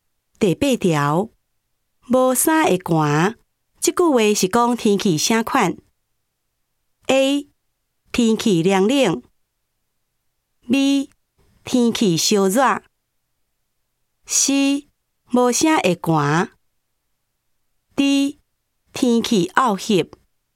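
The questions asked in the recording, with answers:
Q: 无衫会寒,这句话是说天气啥款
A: A: 天气凉冷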